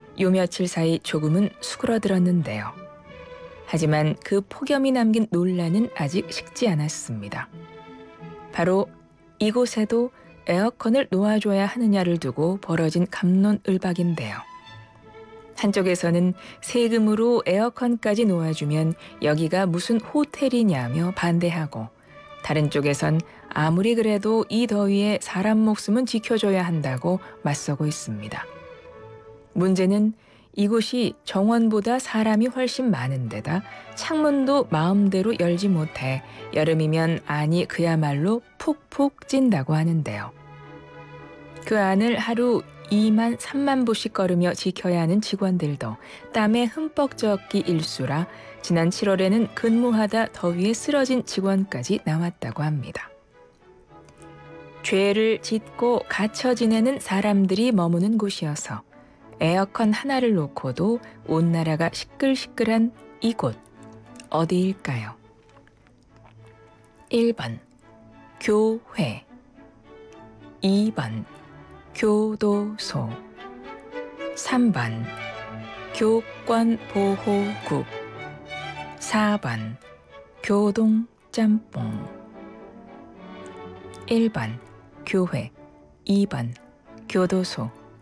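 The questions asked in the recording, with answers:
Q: 죄를 짓고 갇혀 지내는 사람들이 머무는 곳이어서 에어컨 하나를 놓고도 온 나라가 시끌시끌한 이곳, 어디일까요?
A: 2: 교도소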